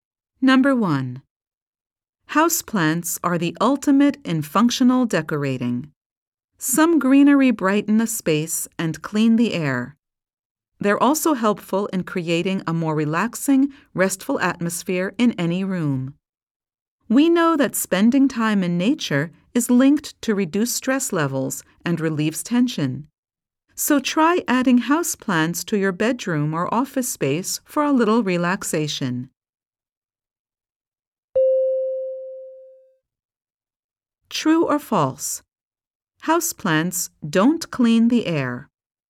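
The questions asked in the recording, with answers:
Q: True or false? Houseplants don't clean the air.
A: False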